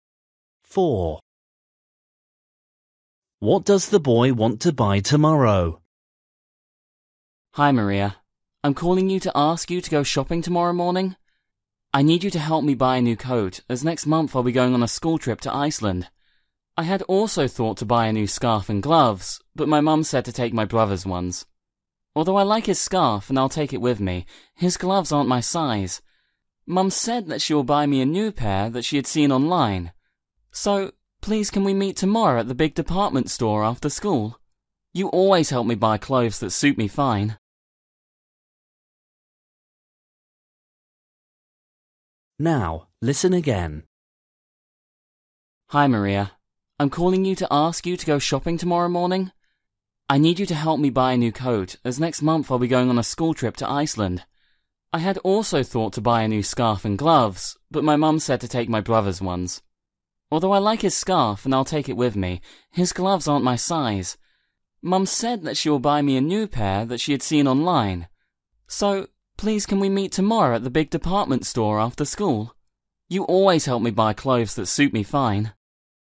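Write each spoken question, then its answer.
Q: What does the boy want to buy tomorrow?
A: a new coat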